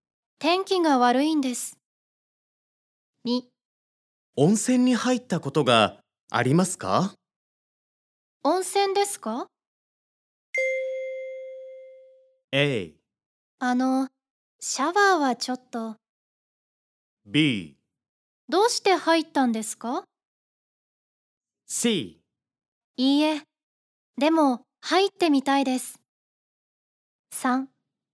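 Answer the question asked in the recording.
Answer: C: いいえ、でも入ってみたいです。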